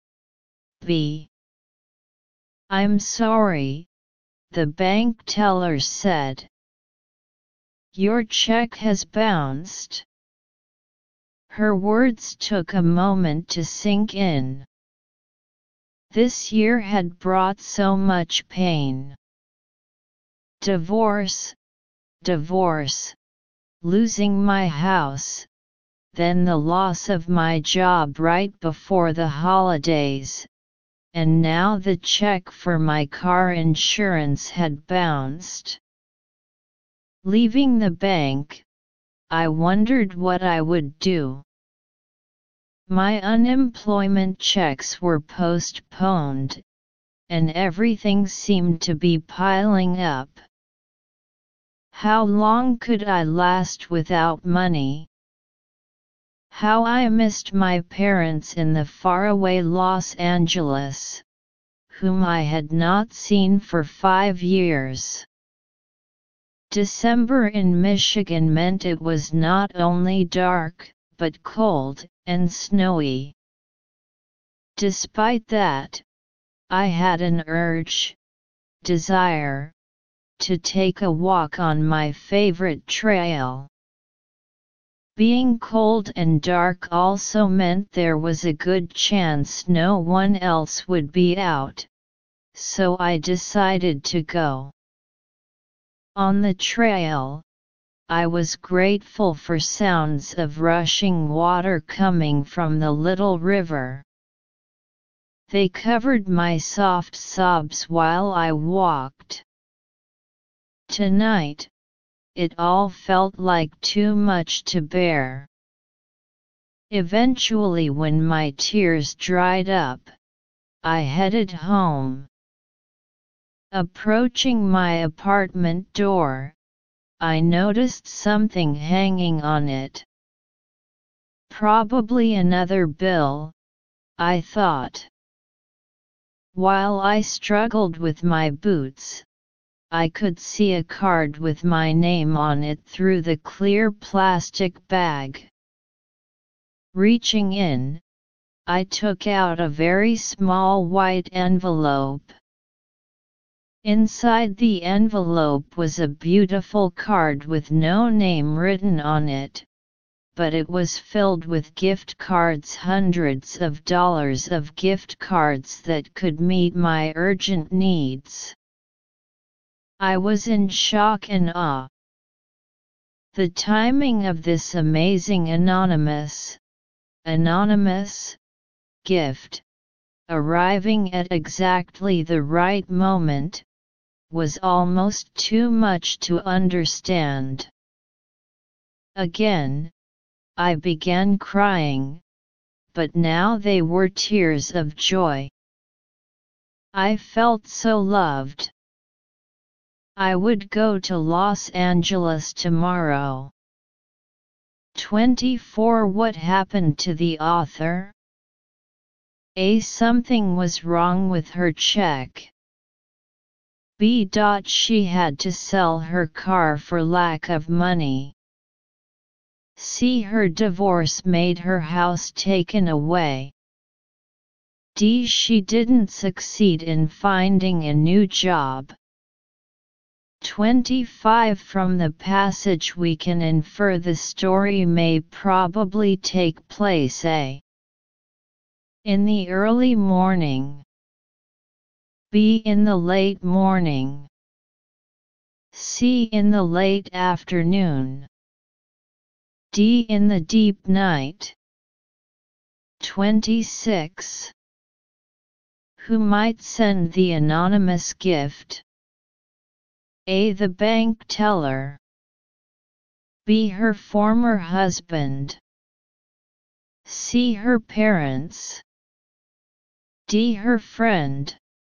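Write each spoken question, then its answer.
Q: What happened to the author?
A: A: Something was wrong with her check.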